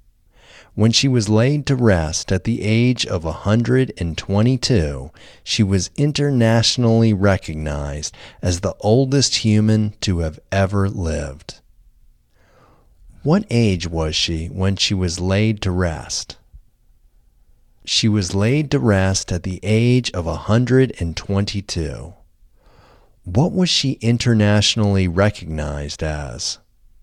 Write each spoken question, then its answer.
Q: What age was she when she was laid to rest?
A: She was laid to rest at the age of 122.

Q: What was she internationally recognized as?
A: She was internationally recognized as the oldest human to have ever lived.